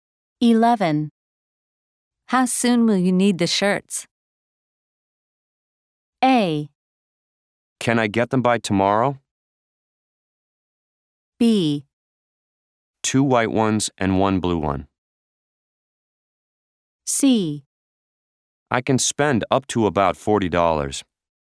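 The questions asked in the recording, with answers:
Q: How soon will you need the shirts?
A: A: Can I get them by tomorrow?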